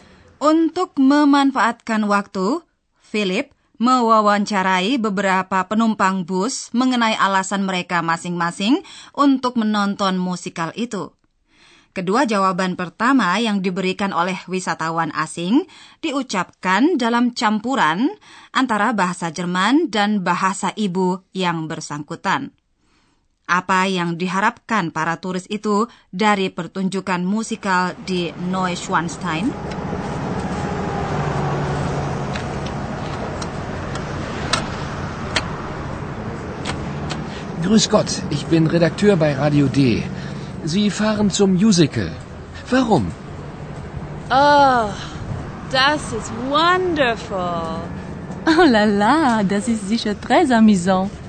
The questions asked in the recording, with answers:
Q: apa yang diharapkan para turis itu dari pertunjukan musikal di Neuschwanstein?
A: Para wisatawan itu mengharapkan pengalaman positif.